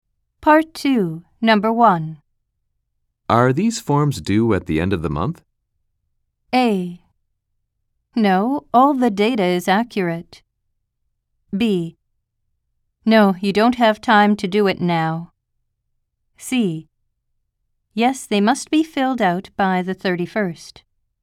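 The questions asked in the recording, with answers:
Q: Are these forms due at the end of the month?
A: C: Yes, they must be filled out by the 31st.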